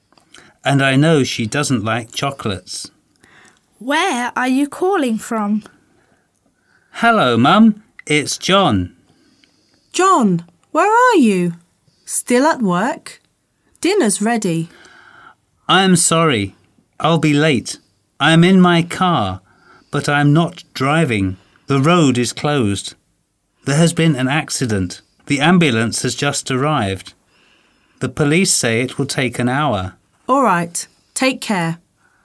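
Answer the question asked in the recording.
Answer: From his car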